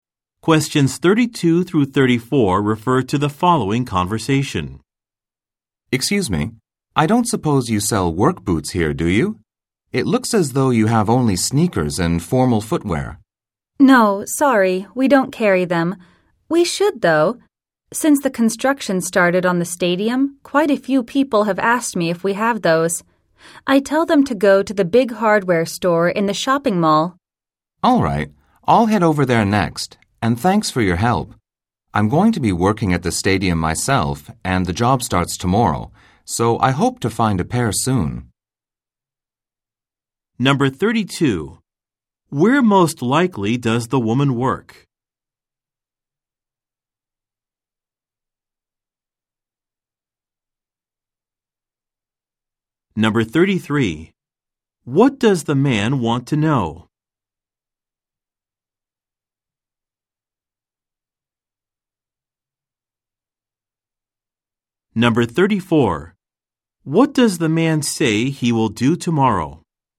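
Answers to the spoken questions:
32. At a shoe store
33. Whether the store sells work boots
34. Start a job at the stadium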